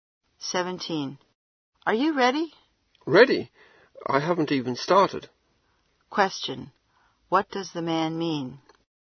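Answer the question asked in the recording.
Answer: He is not ready at all; he hasn't even started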